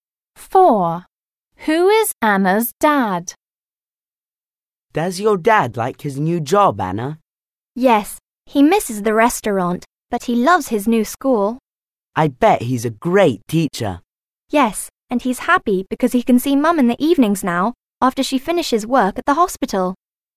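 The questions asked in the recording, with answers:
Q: Who is Anna's dad?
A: a teacher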